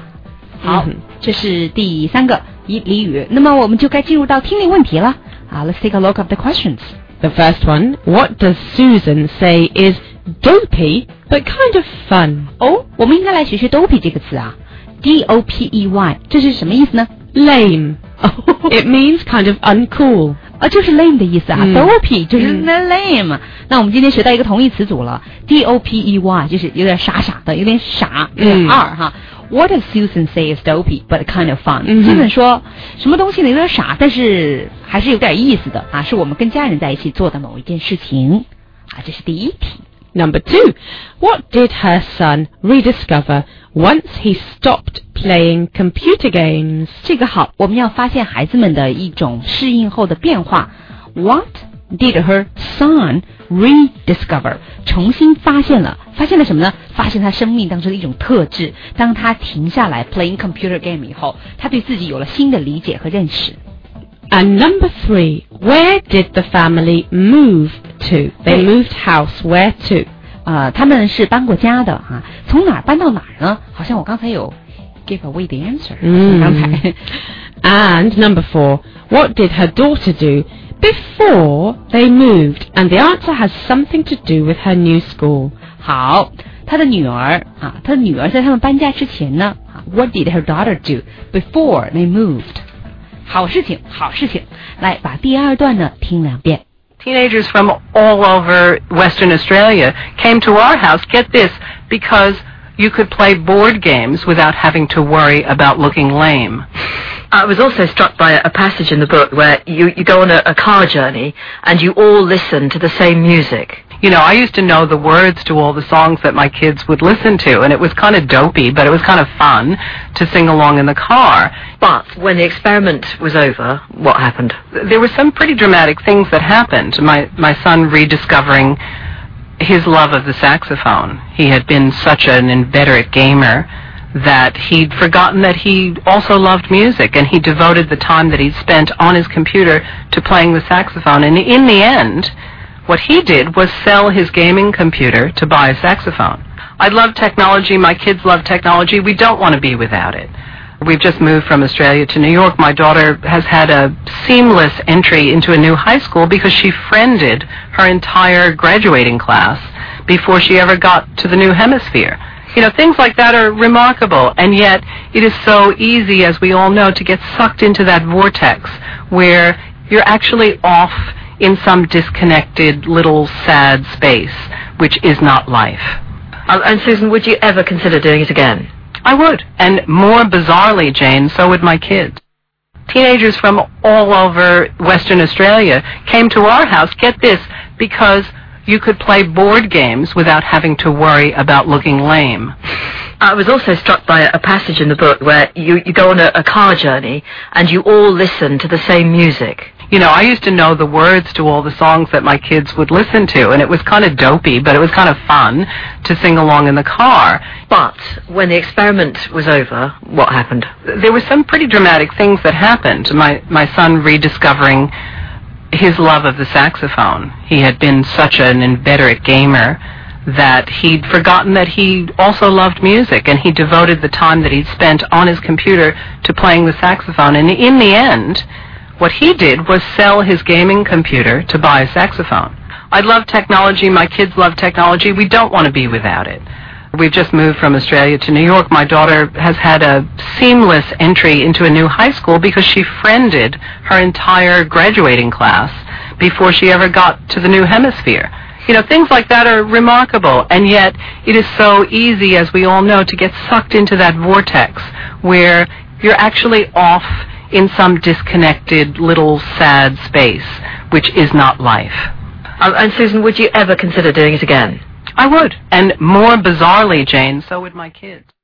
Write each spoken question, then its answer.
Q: The first one, what does Susan say is dopey but kind of fun?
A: Singing along in the car.

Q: Number two, what did her son rediscover once he stopped playing computer games?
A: The saxophone

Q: And number three, where did the family move to?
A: From Australia to New York

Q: And number four, what did her daughter do before they moved?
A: She made friends with her new class by friending them online.